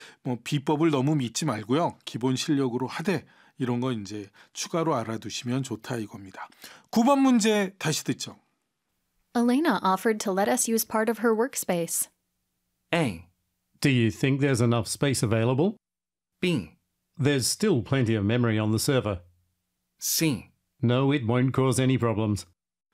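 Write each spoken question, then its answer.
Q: Elena offered to let us use part of her workspace.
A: A: Do you think there's enough space available?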